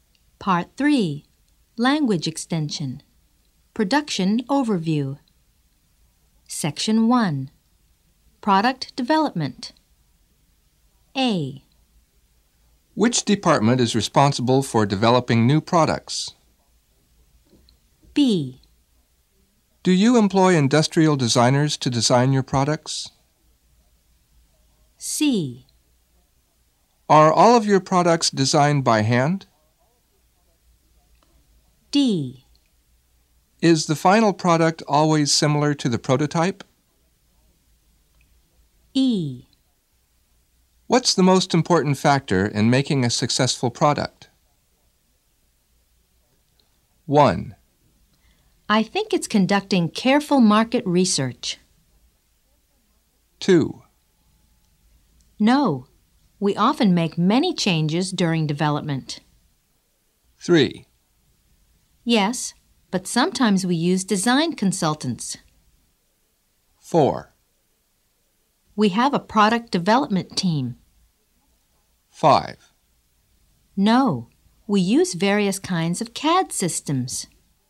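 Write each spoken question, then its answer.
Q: Which department is responsible for developing new products?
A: 4: We have a product development team.

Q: Do you employ industrial designers to design your products?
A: 3: Yes, but sometimes we use design consultants.

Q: Are all of your products designed by hand?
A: 5: No, we use various kinds of CAD systems.

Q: Is the final product always similar to the prototype?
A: 2: No, we often make many changes during development.

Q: What's the most important factor in making a successful product?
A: 1: I think it's conducting careful market research.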